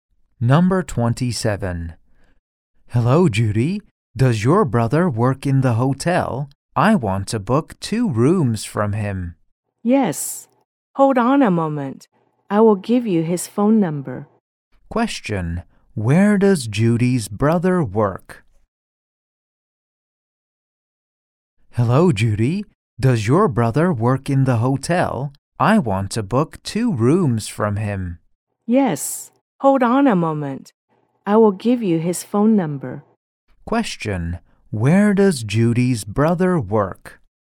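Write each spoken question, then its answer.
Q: Where does Judy's brother work?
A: In the hotel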